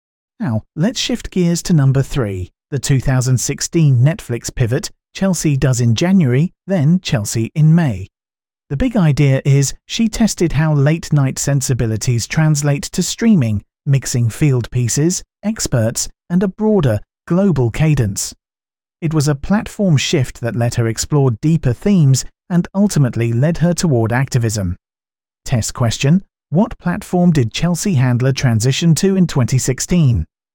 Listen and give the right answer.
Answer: Netflix